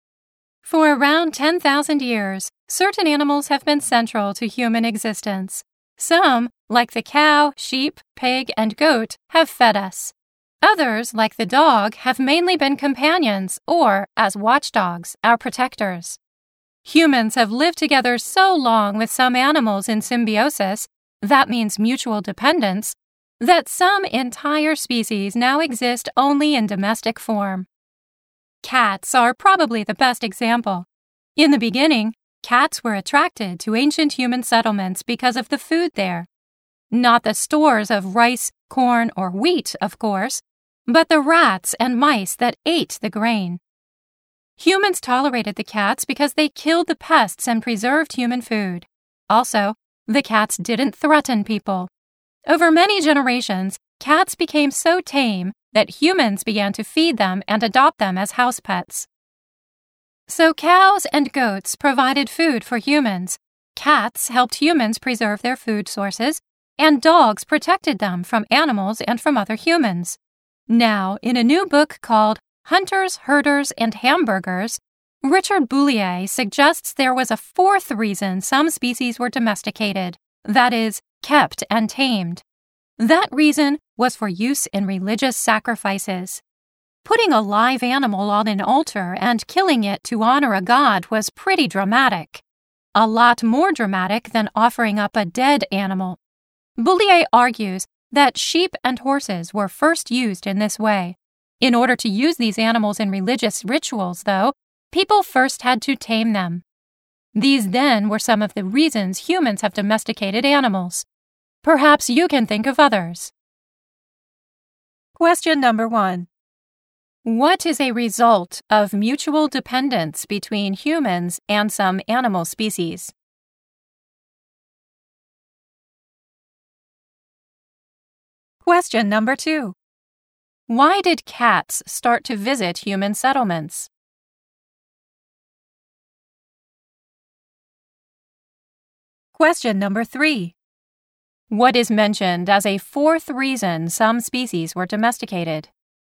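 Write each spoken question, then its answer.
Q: What is a result of mutual dependence between humans and some animal species?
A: Some entire species now exist only in domestic form.

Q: Why did cats start to visit human settlements?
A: Because of the food there: the rats and mice that ate the grain.

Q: What is mentioned as a fourth reason some species were domesticated?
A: For use in religious sacrifices.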